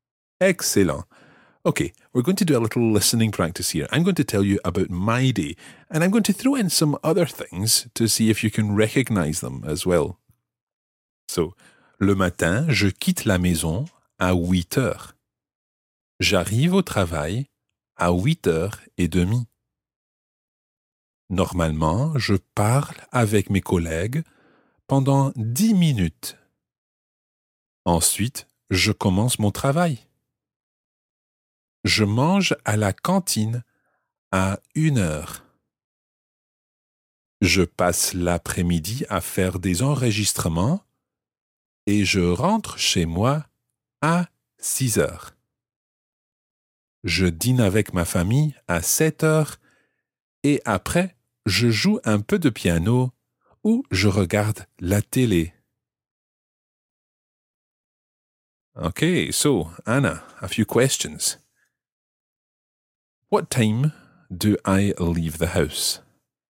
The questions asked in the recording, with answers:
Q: What time do I leave the house?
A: I think you left at 8 o'clock.